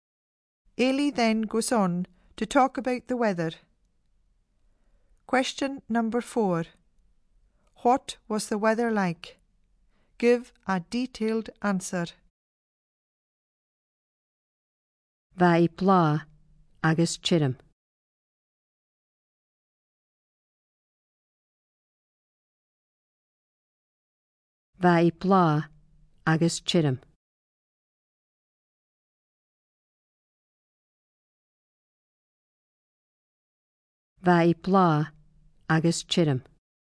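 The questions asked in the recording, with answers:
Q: What was the weather like?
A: Warm and dry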